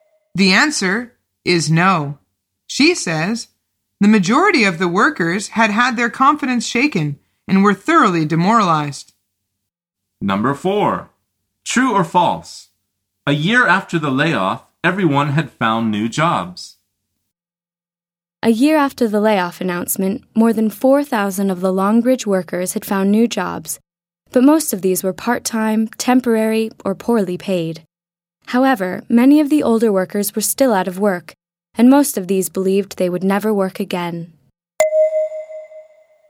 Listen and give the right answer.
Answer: The answer is false.